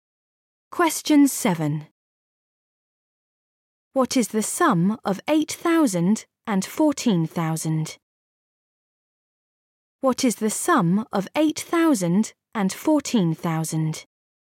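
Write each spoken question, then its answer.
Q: What is the sum of 8,000 and 14,000?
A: 22,000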